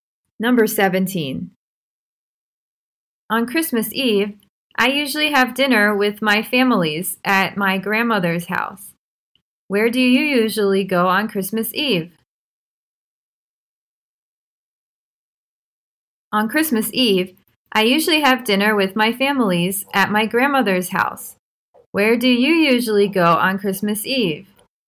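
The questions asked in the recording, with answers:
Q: Where do you usually go on Christmas Eve?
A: My grandmother's house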